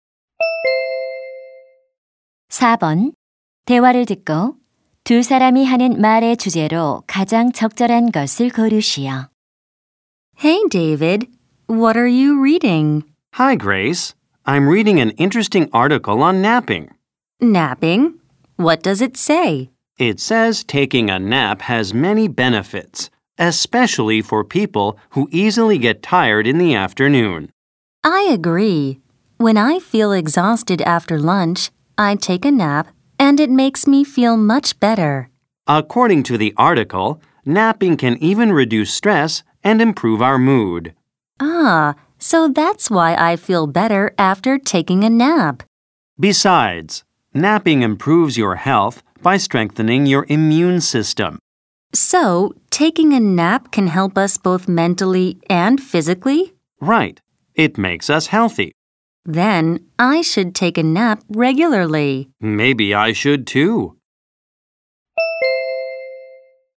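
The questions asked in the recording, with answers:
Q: 대화를 듣고 두 사람이 하는 말의 주제로 가장 적절한 것을 고르시오.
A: 낮잠의 이점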